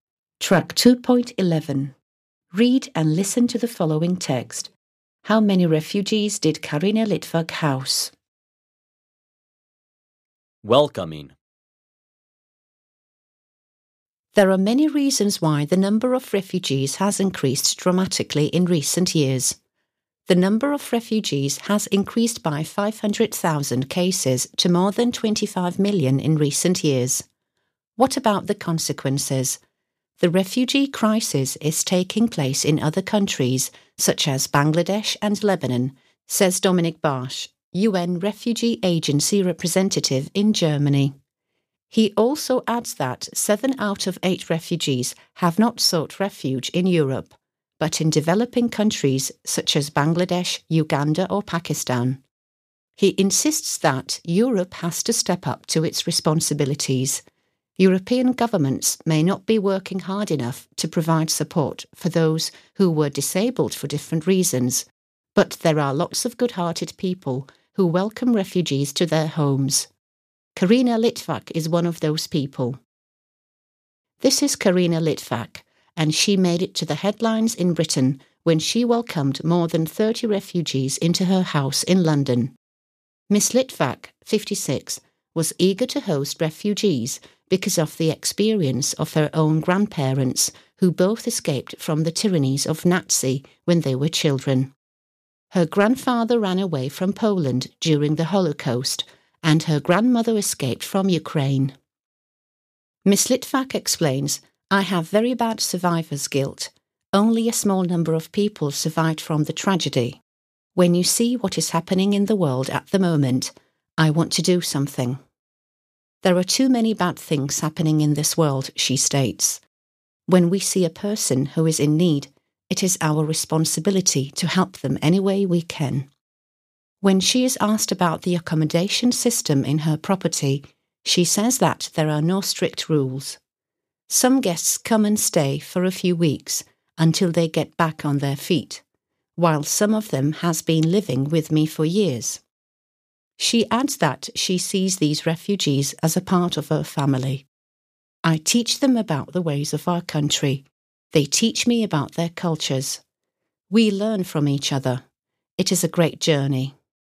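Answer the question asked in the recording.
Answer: More than 30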